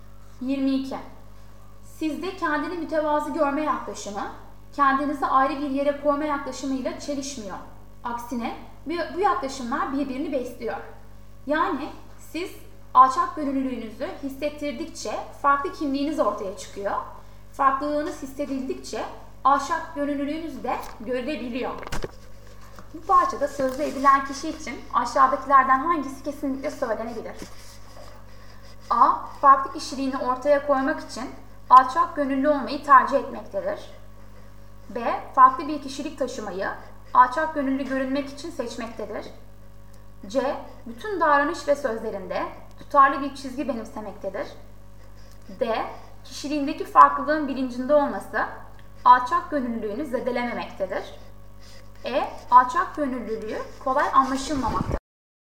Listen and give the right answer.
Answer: Doğru yanıt D.